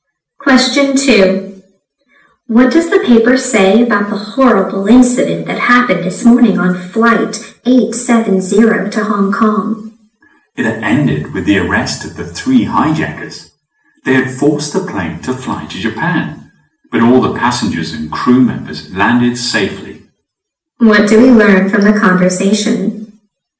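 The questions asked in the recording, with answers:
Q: What do we learn from the conversation?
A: The hijackers were arrested and everyone on board landed safely.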